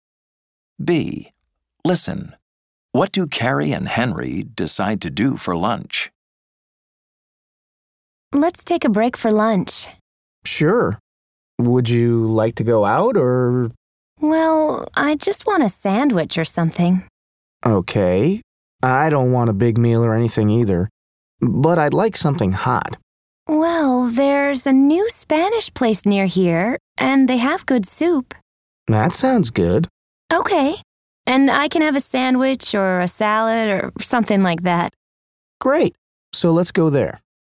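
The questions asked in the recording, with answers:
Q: What do Carrie and Henry decide to do for lunch?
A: Go to the new Spanish place nearby for soup and a sandwich or salad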